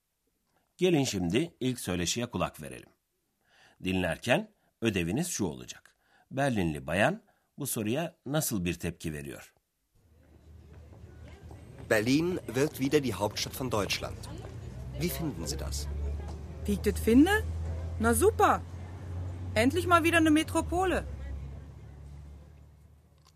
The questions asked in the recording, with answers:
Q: Berlinli bayan bu soruya nasıl bir tepki veriyor?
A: Berlinli bayan kendine özgü konuşmasıyla sevincini belirtti.